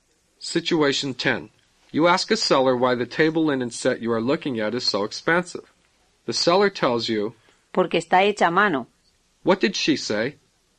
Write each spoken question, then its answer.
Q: What did she say?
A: Because it is handmade.